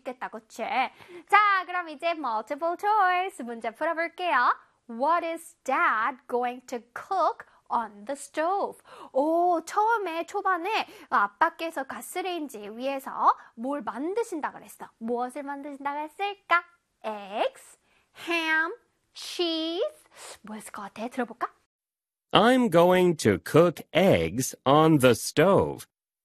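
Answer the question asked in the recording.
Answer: Eggs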